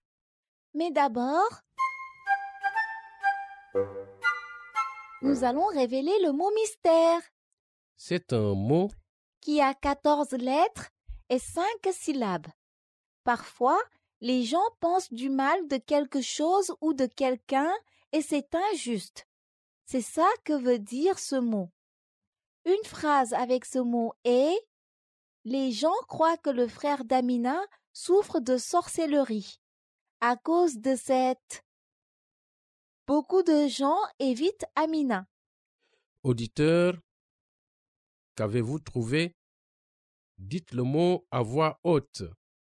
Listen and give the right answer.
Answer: Le mot mystère est stigmatisation.